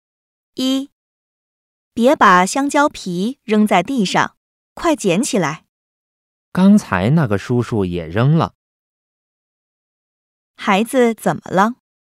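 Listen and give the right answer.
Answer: 孩子把香蕉皮扔在地上了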